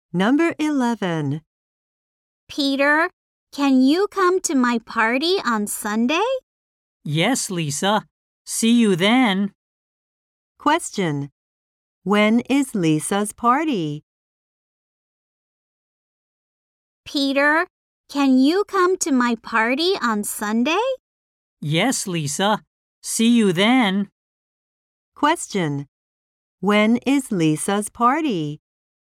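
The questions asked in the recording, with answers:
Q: When is Lisa's party?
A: On Sunday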